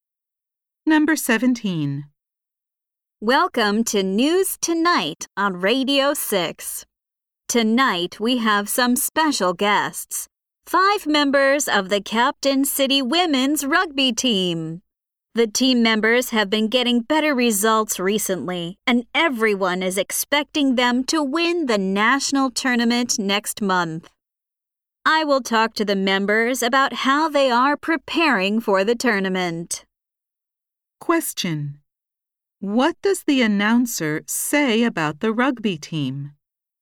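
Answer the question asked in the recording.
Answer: Everyone expects them to win the national tournament next month.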